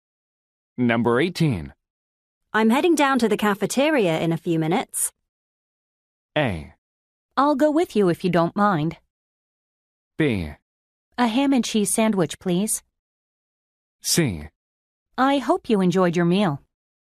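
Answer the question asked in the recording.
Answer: A: I'll go with you if you don't mind.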